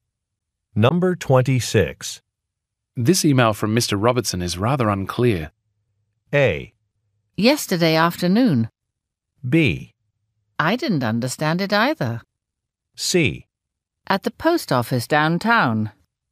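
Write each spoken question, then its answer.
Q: This email from Mr. Robertson is rather unclear.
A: B: I didn't understand it either.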